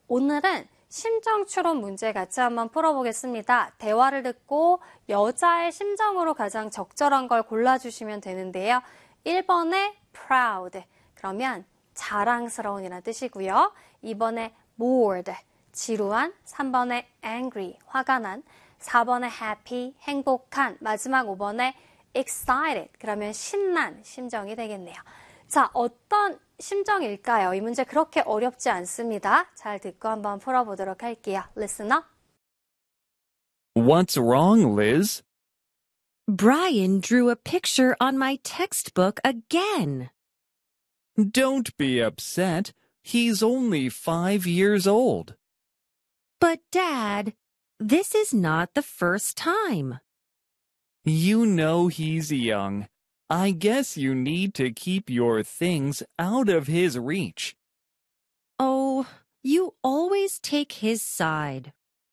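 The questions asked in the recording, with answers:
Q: 대화를 듣고 여자의 심정으로 가장 적절한 걸 골라주시면 되는데요.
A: 3: angry, 화가 난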